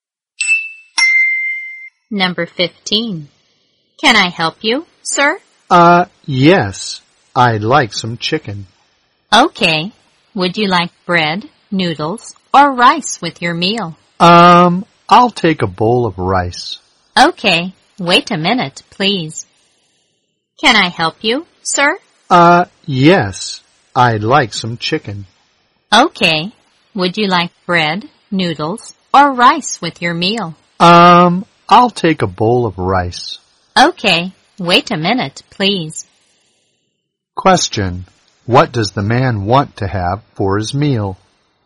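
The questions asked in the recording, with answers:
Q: What does the man want to have for his meal?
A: Chicken with a bowl of rice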